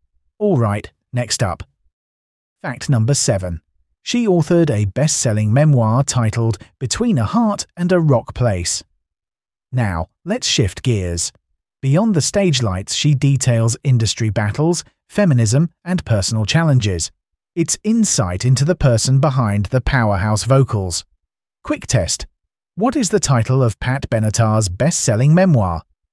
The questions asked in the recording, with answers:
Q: What is the title of Pat Benatar's best-selling memoir?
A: Correct answer. Between a Heart and a Rock Place.